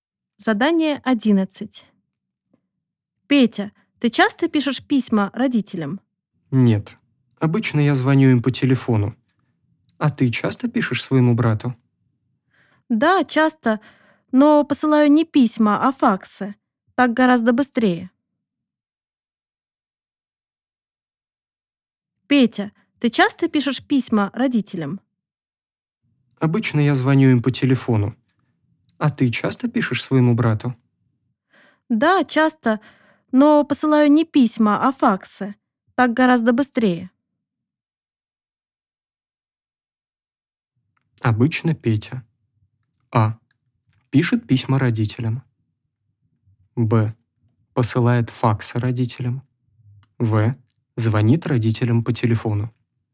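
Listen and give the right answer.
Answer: В: звонит родителям по телефону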